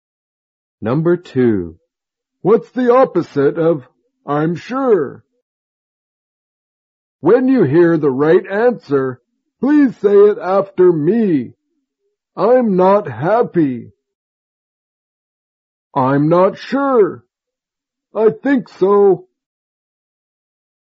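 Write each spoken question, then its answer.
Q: What's the opposite of I'm sure?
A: I'm not sure.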